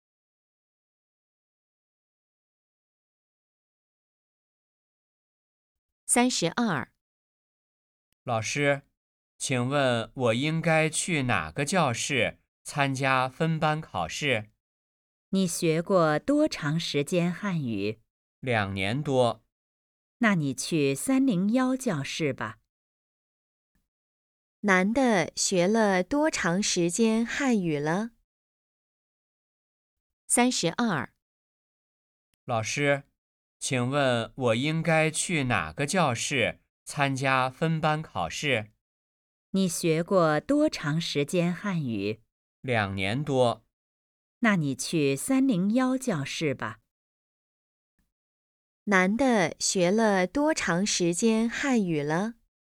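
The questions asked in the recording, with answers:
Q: 男的学了多长时间汉语了?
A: 两年多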